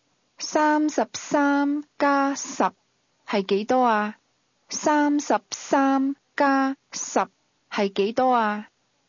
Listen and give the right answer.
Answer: 43。